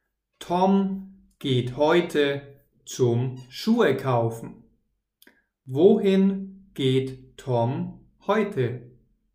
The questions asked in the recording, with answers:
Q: Wohin geht Tom heute?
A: zum Schuhe kaufen. Er geht heute zum Schuhe kaufen.